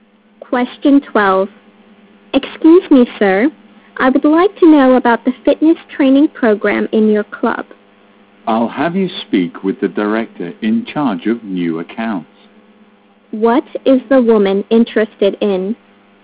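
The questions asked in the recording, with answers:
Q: What is the woman interested in?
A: The club's fitness training program.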